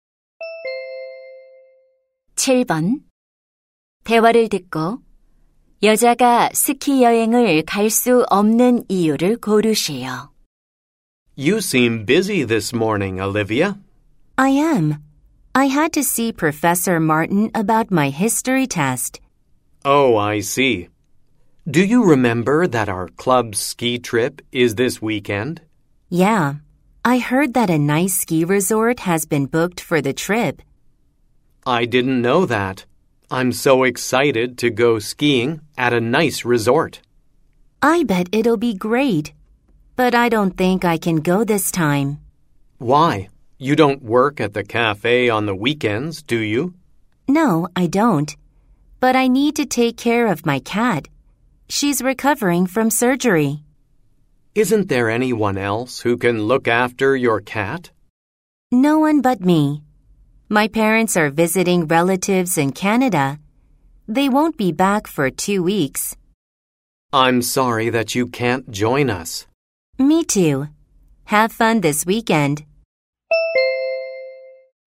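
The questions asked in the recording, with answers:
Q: 대화를 듣고 여자가 스키 여행을 갈 수 없는 이유를 고르시오.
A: 수술에서 회복 중인 고양이를 돌봐야 해서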